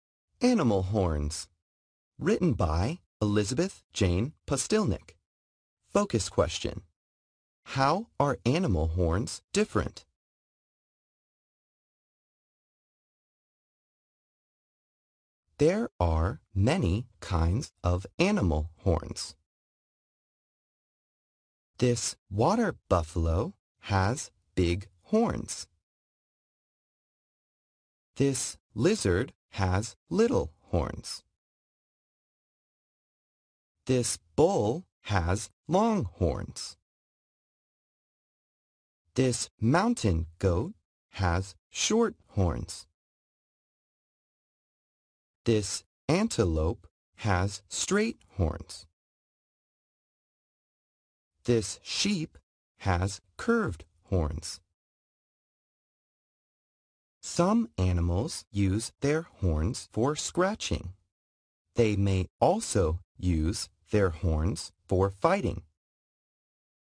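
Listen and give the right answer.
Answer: They differ in size and shape: big or little, long or short, straight or curved.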